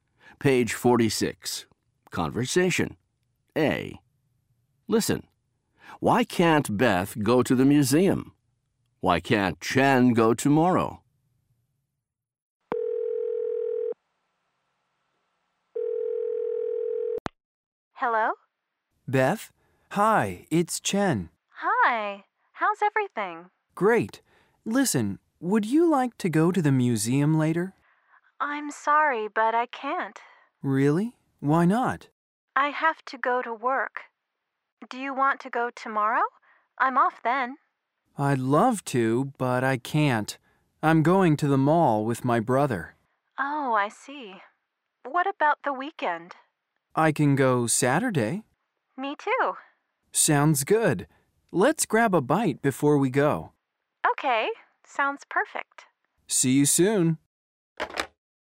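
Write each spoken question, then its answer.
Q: Why can't Beth go to the museum?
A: She has to go to work.

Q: Why can't Chen go tomorrow?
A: He's going to the mall with his brother.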